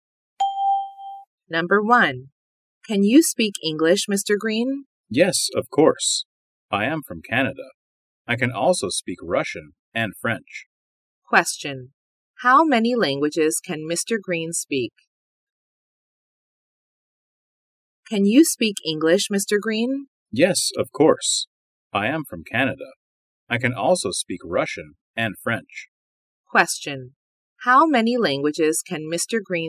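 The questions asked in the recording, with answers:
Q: How many languages can Mr. Green speak?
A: Three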